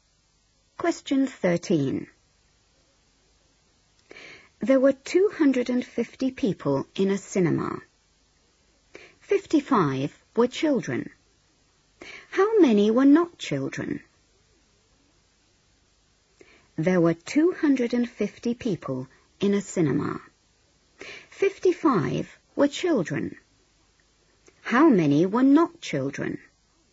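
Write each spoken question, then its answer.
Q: 55 were children. How many were not children?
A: 195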